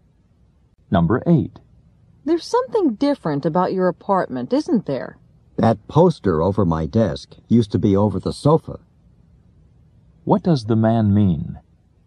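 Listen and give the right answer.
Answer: He moved the poster from over the sofa to over his desk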